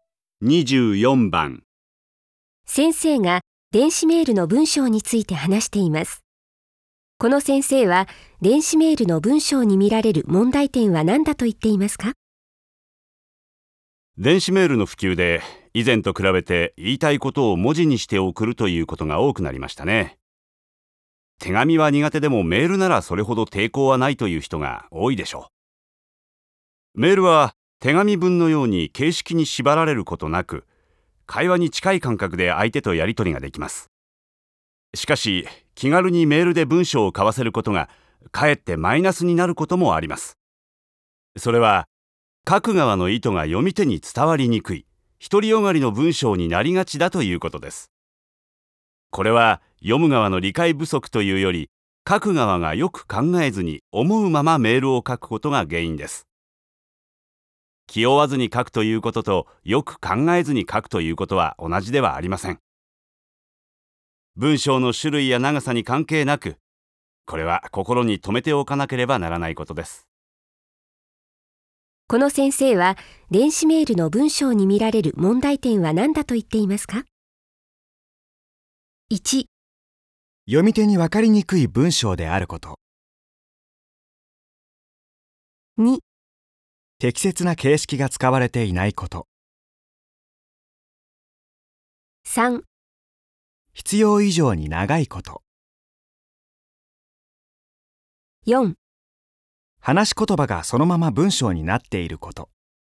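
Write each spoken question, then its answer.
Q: この先生は、電子メールの文章に見られる問題点は何だと言っていますか?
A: 1: 読み手に分かりにくい文章であること。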